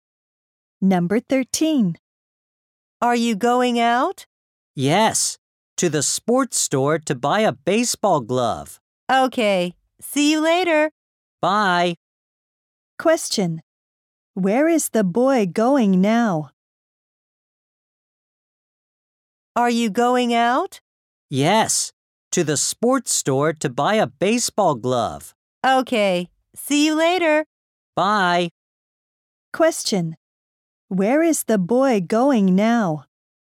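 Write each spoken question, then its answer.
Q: Where is the boy going now?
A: To the sports store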